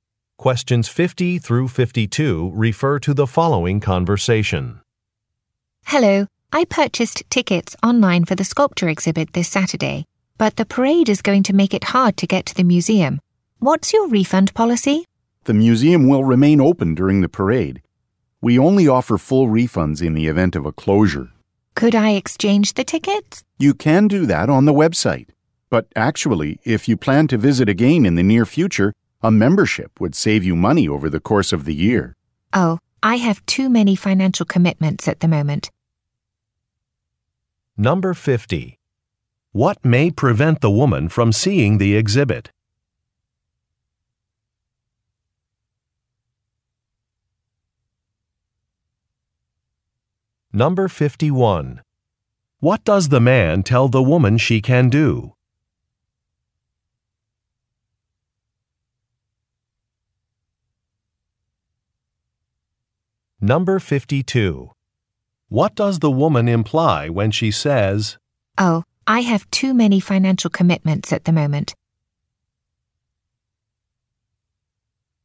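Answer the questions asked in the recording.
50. A parade
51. Exchange the tickets on the website
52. She won't buy a membership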